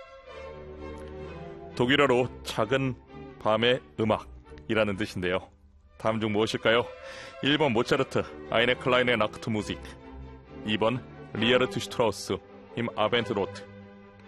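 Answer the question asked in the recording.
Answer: 1: 모차르트, 아이네 클라인의 낙트 무직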